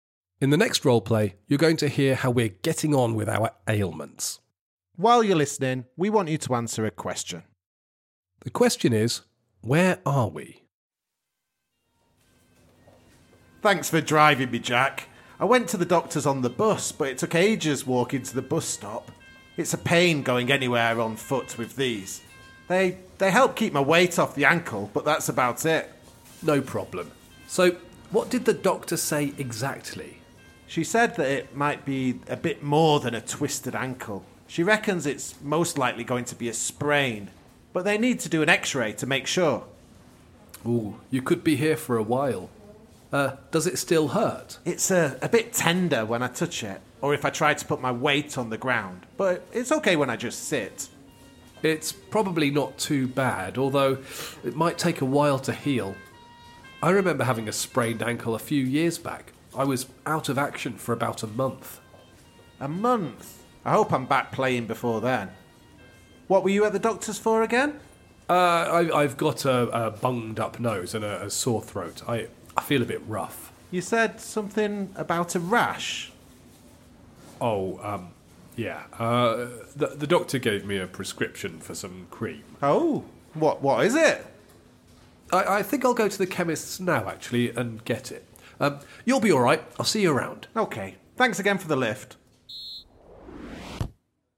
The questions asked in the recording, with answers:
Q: The question is, where are we?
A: We were in a hospital waiting room.